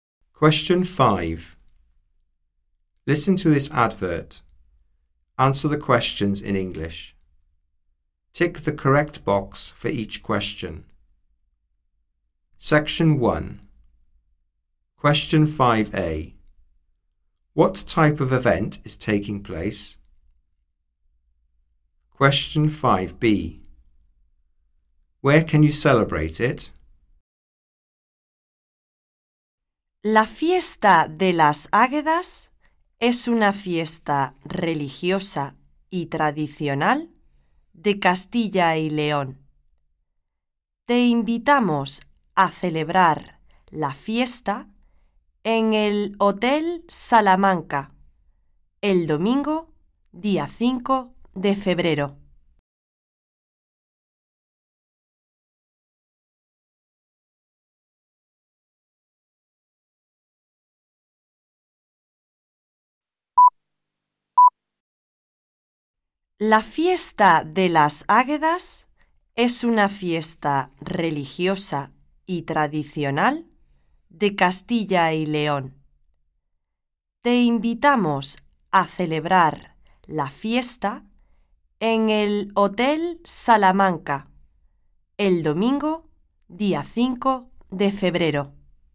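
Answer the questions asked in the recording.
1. A religious, traditional festival
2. At the Hotel Salamanca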